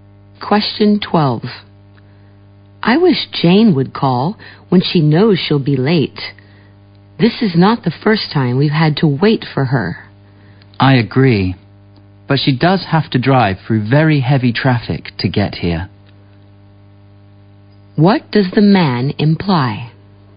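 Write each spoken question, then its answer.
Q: What does the man imply?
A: Jane's lateness is understandable because of heavy traffic.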